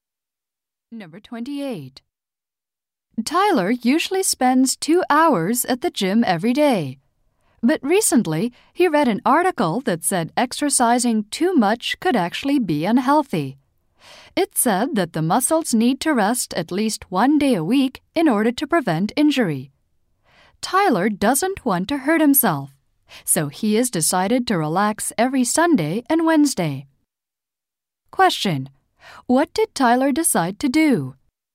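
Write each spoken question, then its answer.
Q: What did Tyler decide to do?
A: Rest every Sunday and Wednesday.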